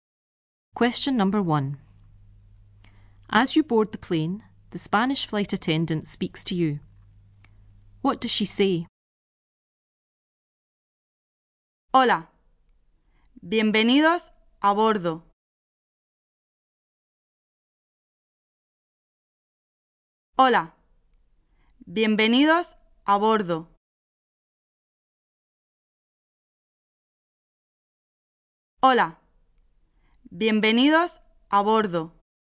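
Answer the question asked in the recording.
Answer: Hello, welcome aboard.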